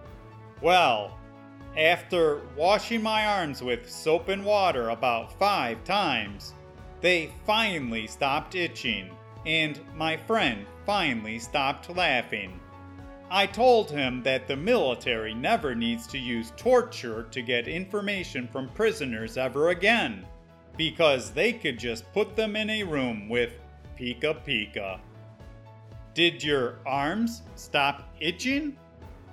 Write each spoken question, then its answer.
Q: Did your arms stop itching?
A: Yes. After I was able to wash off all the microscopic pica pica hairs off my arms, they finally stopped itching.